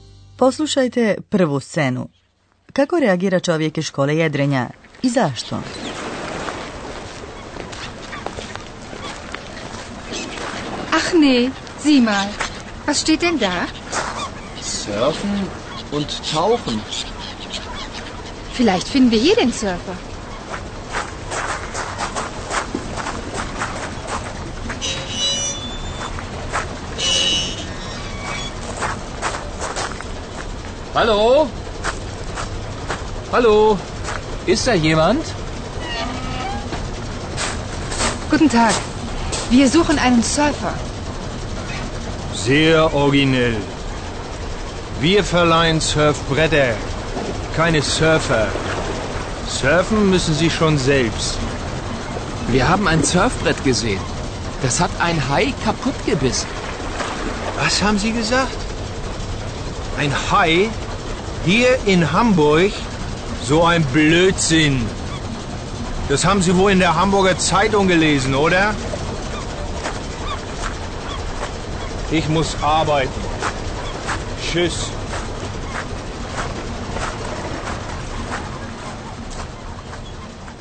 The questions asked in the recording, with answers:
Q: Kako reagira čovjek iz škole jedrenja i zašto?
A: Čovjek iz škole jedrenja reagira vrlo zlovoljno.